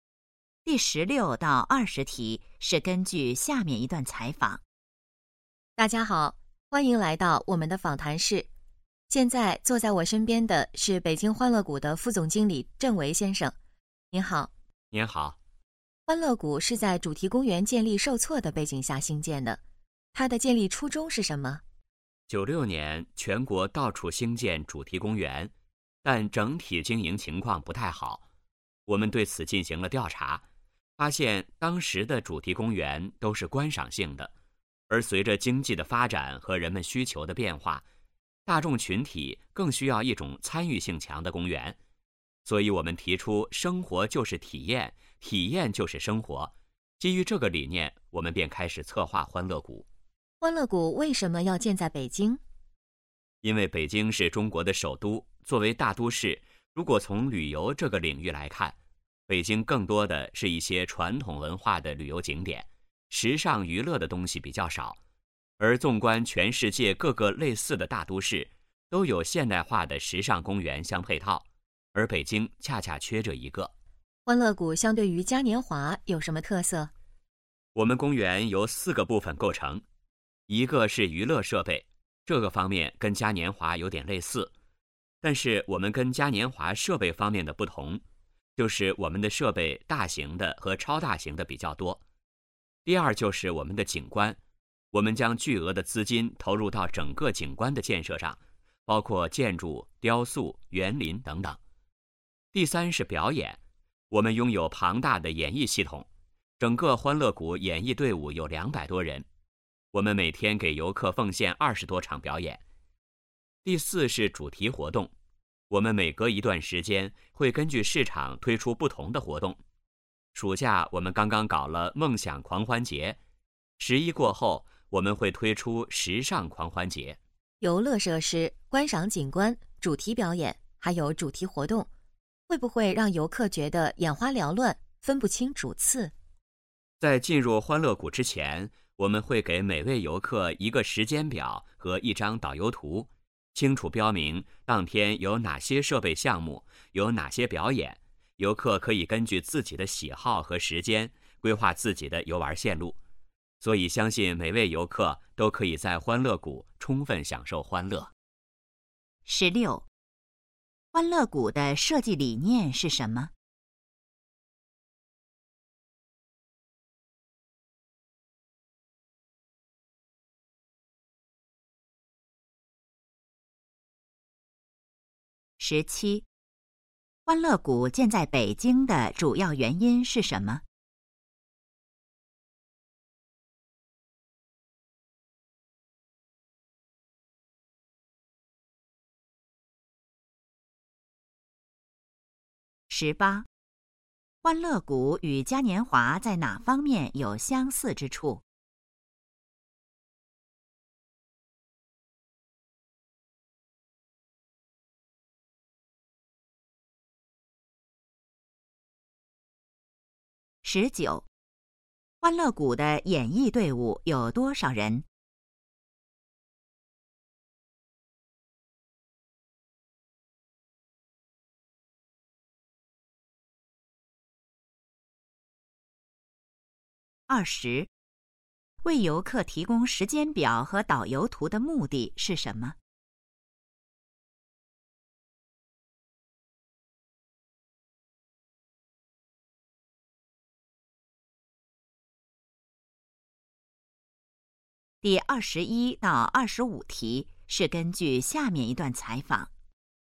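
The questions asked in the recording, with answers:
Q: 欢乐谷的设计理念是什么?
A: 生活就是体验,体验就是生活

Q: 欢乐谷建在北京的主要原因是什么?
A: 北京缺少现代化的时尚娱乐公园

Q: 欢乐谷与嘉年华在哪方面有相似之处?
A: 娱乐设备

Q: 欢乐谷的演艺队伍有多少人?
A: 200多人

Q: 为游客提供时间表和导游图的目的是什么?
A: 让游客根据喜好和时间规划游玩线路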